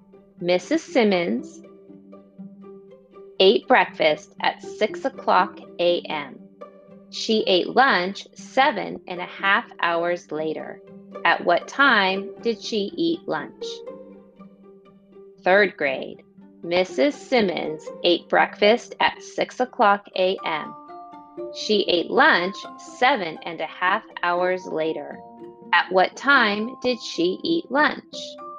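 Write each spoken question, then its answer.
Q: At what time did she eat lunch?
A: 1:30 p.m.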